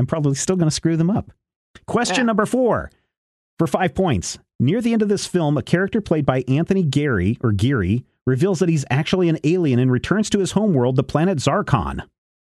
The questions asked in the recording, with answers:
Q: Near the end of this film, a character played by Anthony Geary reveals that he's actually an alien and returns to his homeworld, the planet Zarkon.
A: UHF.